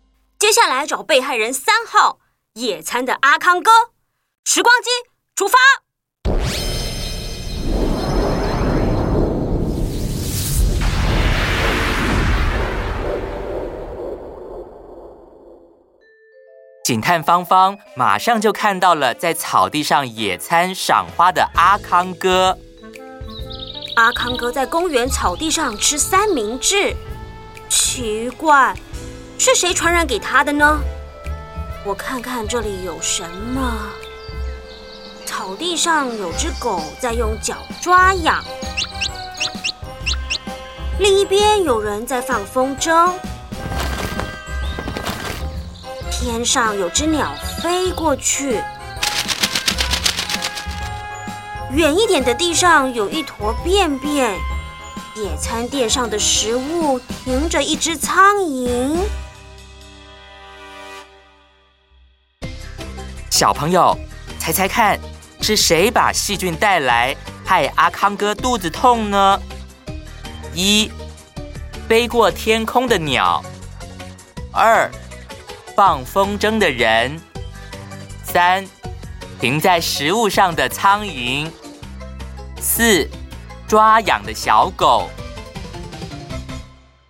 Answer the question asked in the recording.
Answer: 答案是三,停在食物上的苍蝇。